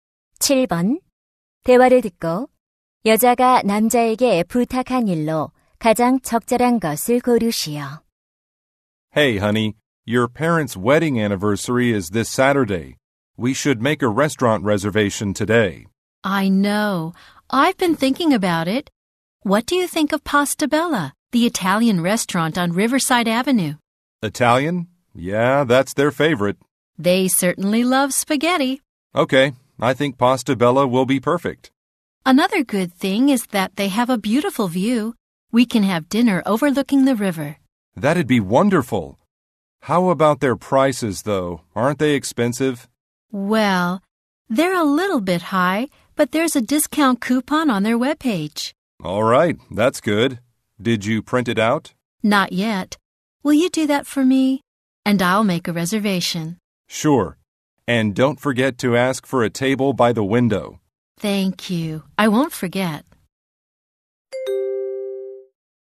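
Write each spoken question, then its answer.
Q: 대화를 듣고 여자가 남자에게 부탁한 일로 가장 적절한 것을 고르시오.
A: 할인 쿠폰 출력하기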